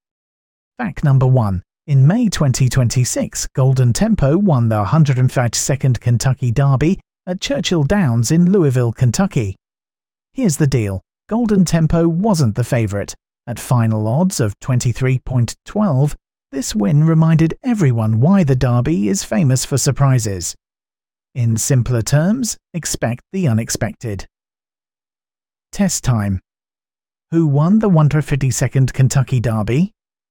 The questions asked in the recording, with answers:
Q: Who won the 152nd Kentucky Derby?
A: Correct answer, Golden Tempo.